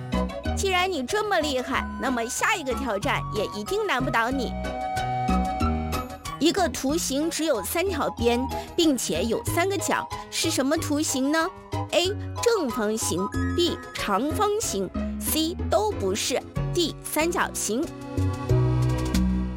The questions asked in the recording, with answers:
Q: 一个图形只有三条边,并且有三个角,是什么图形呢?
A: 答案就是 D 三角形。